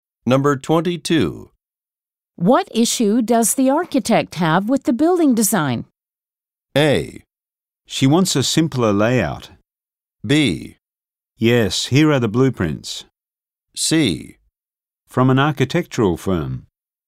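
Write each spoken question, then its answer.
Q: What issue does the architect have with the building design?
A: A: She wants a simpler layout.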